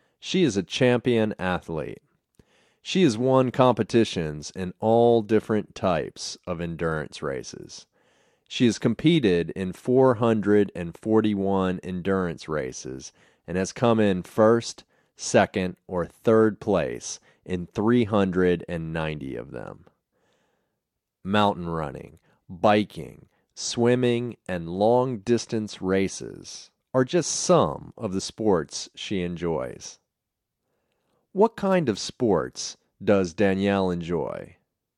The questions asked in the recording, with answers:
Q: What kind of sports does Danielle enjoy?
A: She enjoys mountain running, biking, swimming, and long distance races.